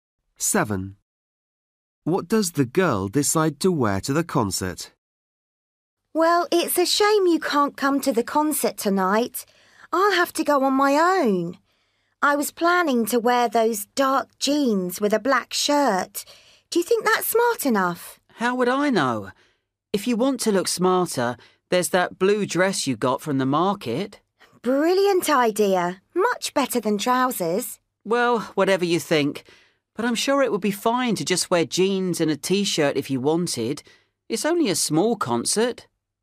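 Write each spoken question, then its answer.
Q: What does the girl decide to wear to the concert?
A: The blue dress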